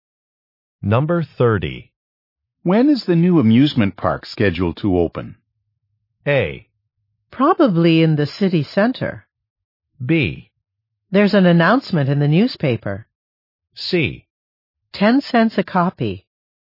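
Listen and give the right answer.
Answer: B: There's an announcement in the newspaper.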